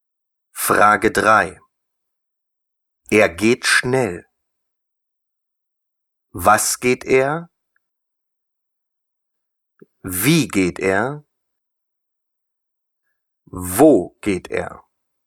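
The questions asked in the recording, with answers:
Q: Er geht schnell.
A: Wie geht er?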